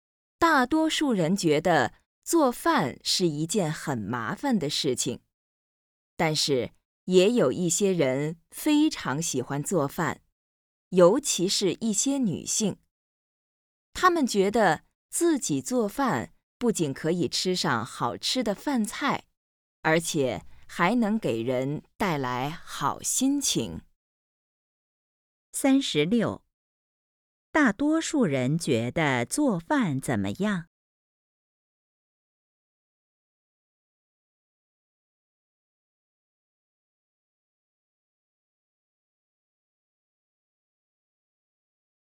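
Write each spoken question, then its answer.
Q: 大多数人觉得做饭怎么样?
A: 很麻烦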